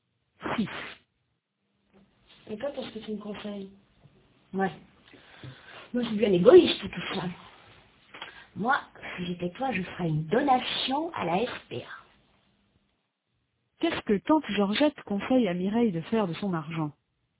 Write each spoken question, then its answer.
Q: Qu'est-ce que Tante Georgette conseille à Mireille de faire de son argent ?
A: Elle lui conseille de faire une donation à la SPA.